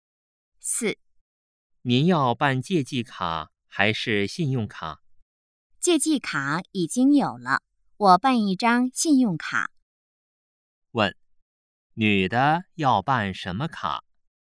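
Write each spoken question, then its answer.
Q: 问,女的要办什么卡?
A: 信用卡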